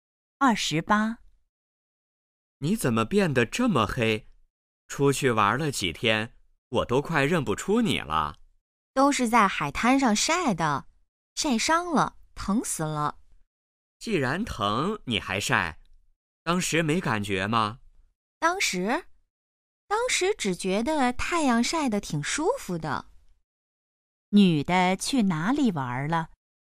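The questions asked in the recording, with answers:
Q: 女的去哪里玩了?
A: 海滩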